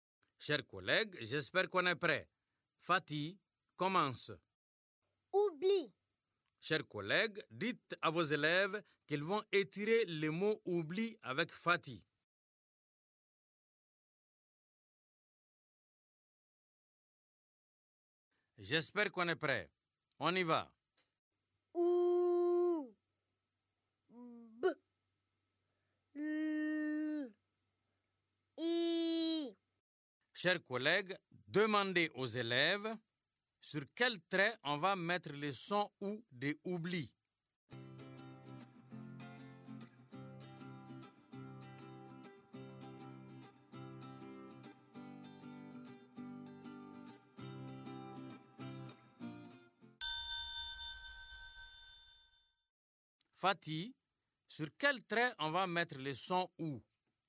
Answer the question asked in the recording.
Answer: Monsieur, on va mettre le son ou sur le premier trait.